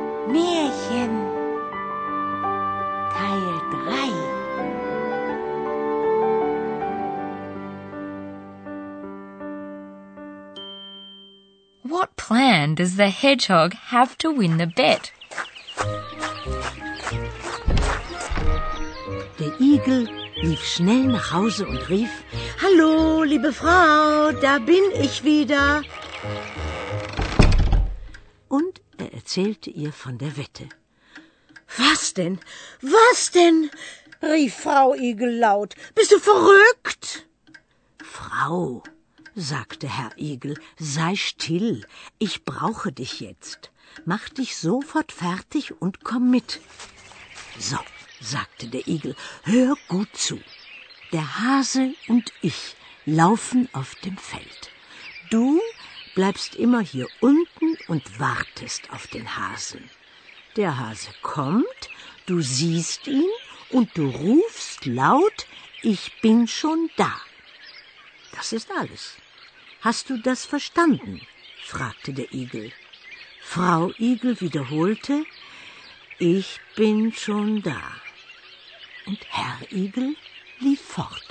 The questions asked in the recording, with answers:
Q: What plan does the hedgehog have to win the bet?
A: The hedgehog's plan was to get his wife involved in the action.